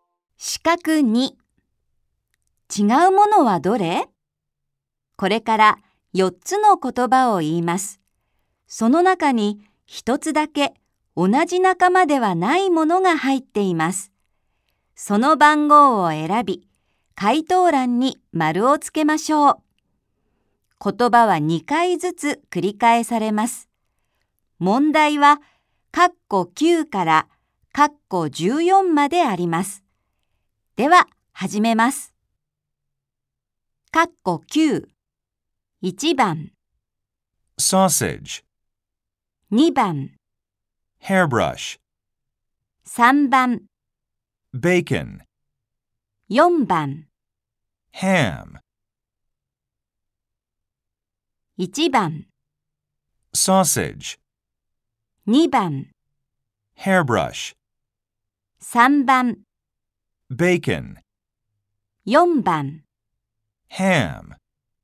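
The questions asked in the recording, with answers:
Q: 違うものはどれ?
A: 2: Hairbrush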